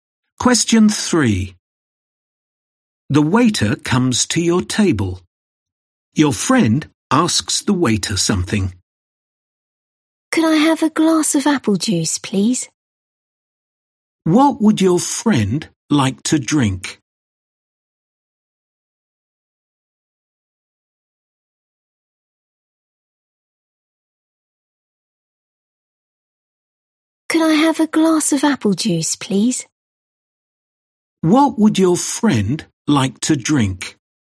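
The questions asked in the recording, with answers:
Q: What would your friend like to drink?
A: A glass of apple juice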